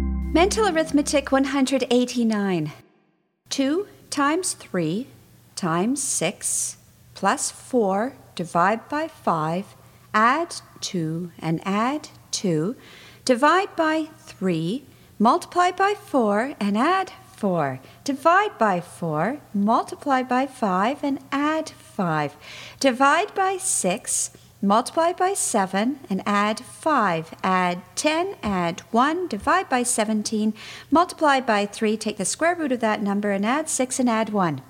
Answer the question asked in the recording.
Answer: And the answer is 10.